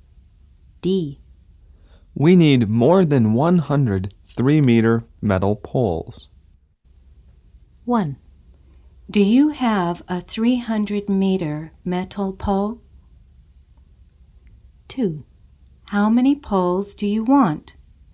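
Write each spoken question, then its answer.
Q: Do you have a 300-meter metal pole?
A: No, we need over 100 3-meter poles

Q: How many poles do you want?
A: More than 100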